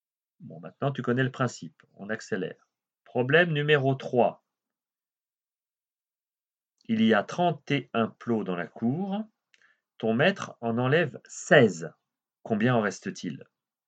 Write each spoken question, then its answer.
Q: Combien en reste-t-il?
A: Il en reste 15.